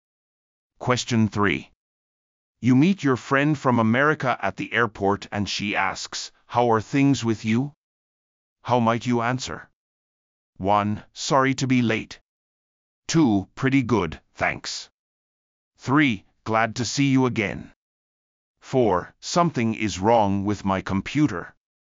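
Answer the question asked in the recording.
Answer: 2: Pretty good, thanks.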